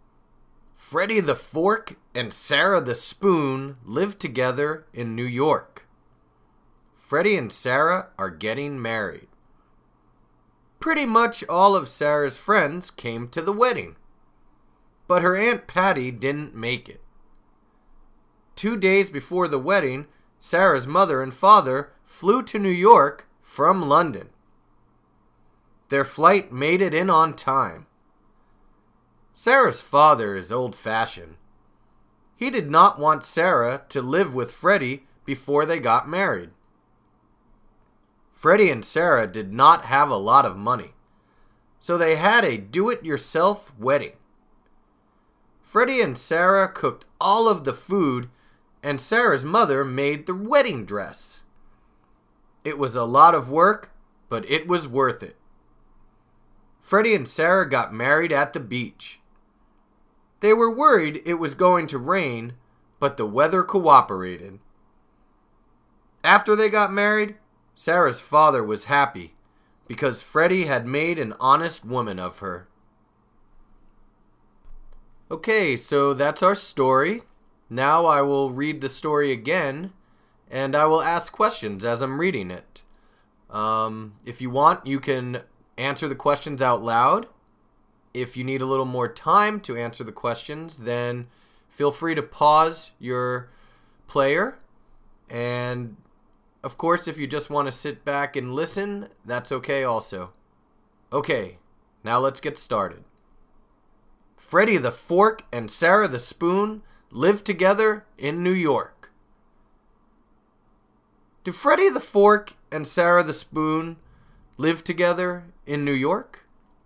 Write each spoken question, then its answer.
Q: Do Freddie the Fork and Sarah the Spoon live together in New York?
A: Yes, they do. They live together in New York.